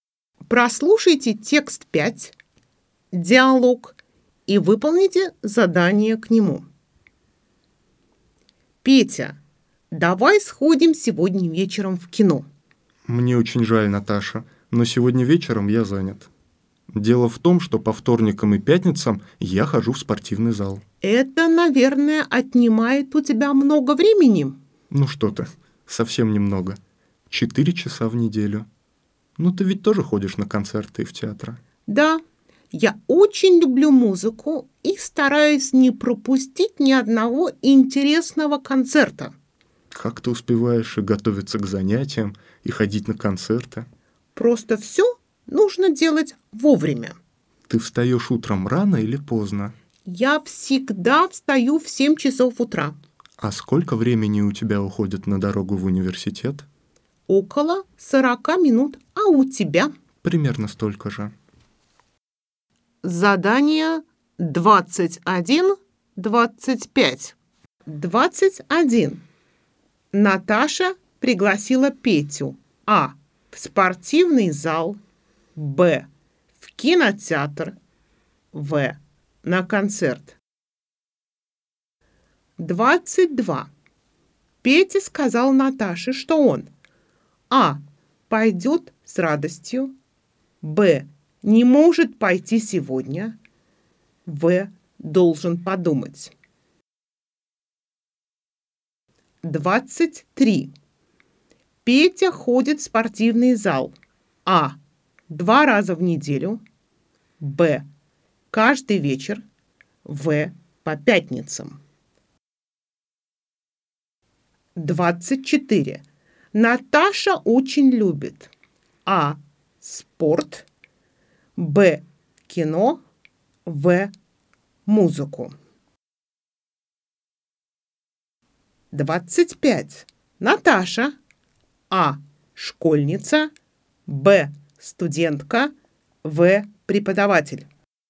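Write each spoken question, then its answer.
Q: Наташа пригласила Петю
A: Б: в кинотеатр

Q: Петя сказал Наташе, что он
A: Б: не может пойти сегодня

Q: Петя ходит в спортивный зал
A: А: 2 раза в неделю

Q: Наташа очень любит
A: В: музыку

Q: Наташа.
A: Б: Студентка.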